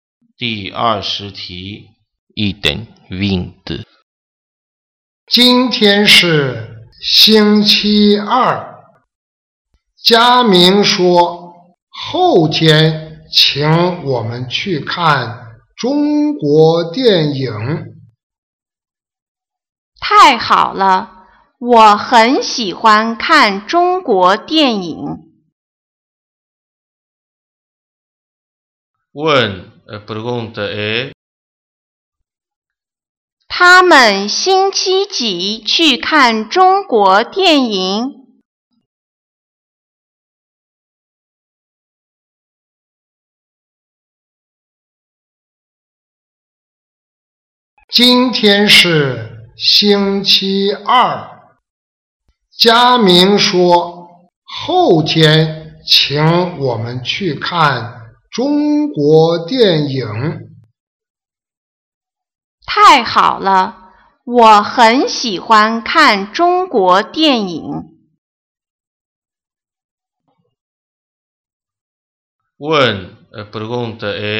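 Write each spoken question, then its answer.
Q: 他们星期几去看中国电影?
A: 星期四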